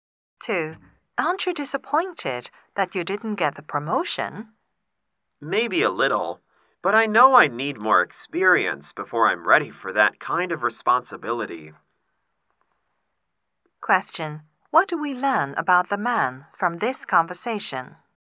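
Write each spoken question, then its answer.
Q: What do we learn about the man from this conversation?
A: He thinks he needs more experience before he is ready for a promotion.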